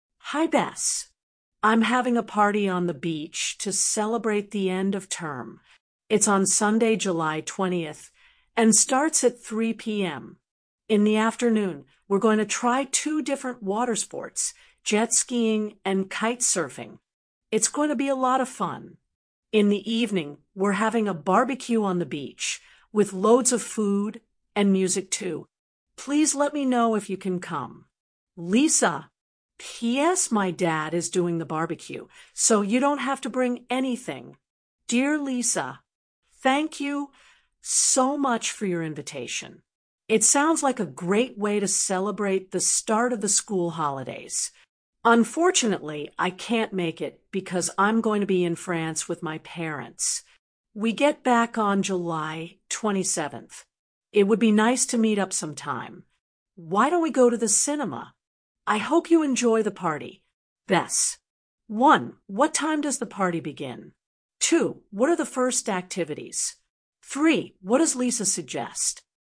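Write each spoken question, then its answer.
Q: What time does the party begin?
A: 3 p.m.

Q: What are the first activities?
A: jet skiing and kite surfing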